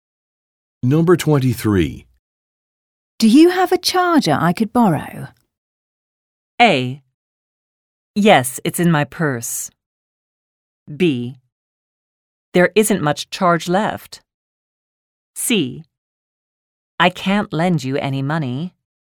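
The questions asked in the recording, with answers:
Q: Do you have a charger I could borrow?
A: A: Yes, it's in my purse.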